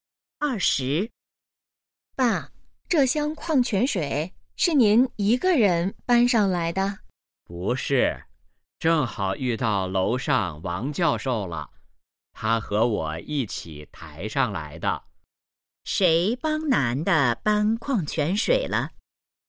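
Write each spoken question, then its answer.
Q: 谁帮男的搬矿泉水了?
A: 王教授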